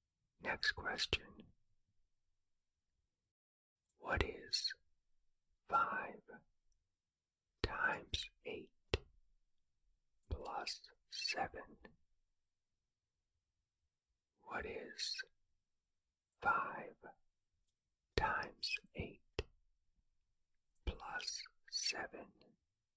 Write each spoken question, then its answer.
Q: What is 5 times 8 plus 7?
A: The answer is 47.